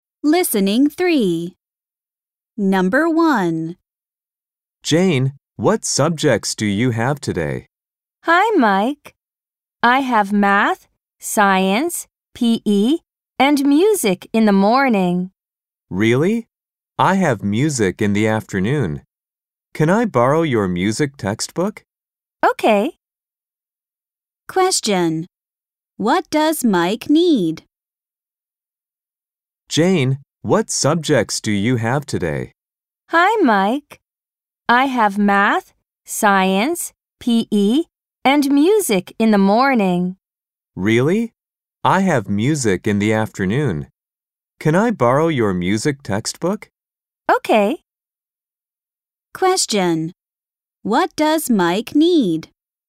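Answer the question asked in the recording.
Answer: A music textbook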